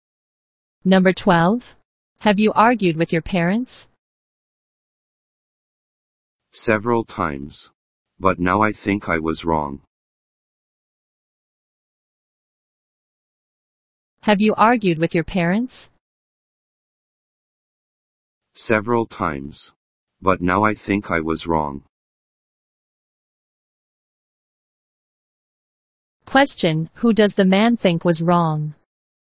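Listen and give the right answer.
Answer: Himself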